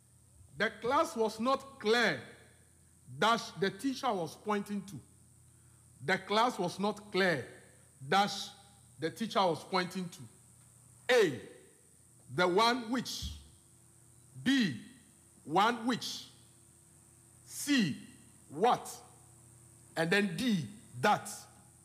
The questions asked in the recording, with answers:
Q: Dash, the teacher was pointing to.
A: It is what.